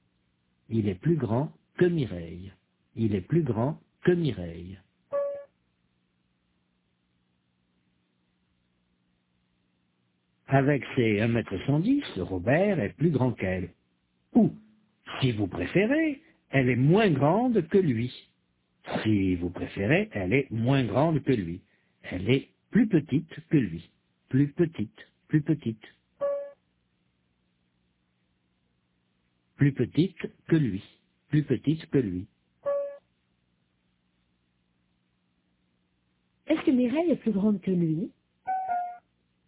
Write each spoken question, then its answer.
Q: Est-ce que Mireille est plus grande que lui?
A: Non, elle est plus petite que lui.